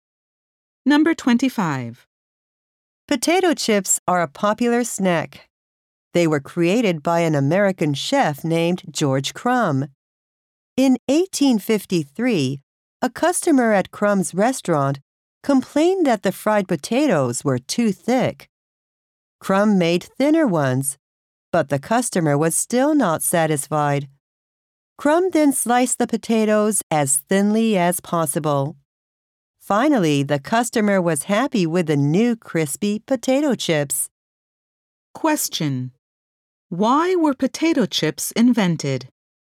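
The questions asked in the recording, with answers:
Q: Why were potato chips invented?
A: A customer complained that the fried potatoes were too thick.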